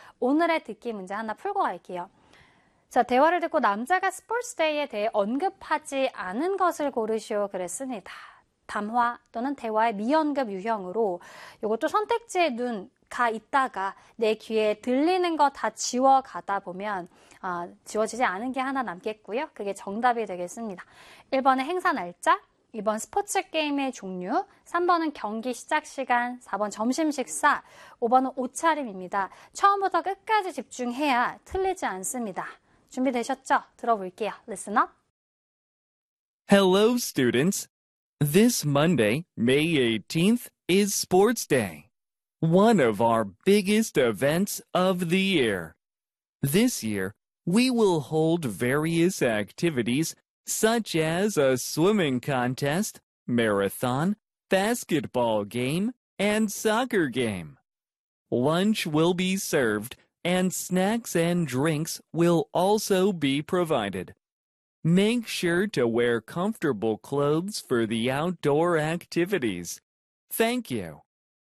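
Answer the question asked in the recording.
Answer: 3: 경기 시작 시간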